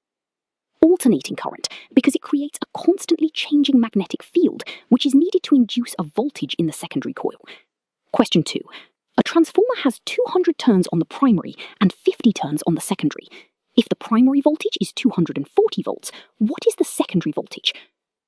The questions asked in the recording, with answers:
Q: If the primary voltage is 240 volts, what is the secondary voltage?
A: Vs equals 240 times 50 divided by 200, which gives 60 volts.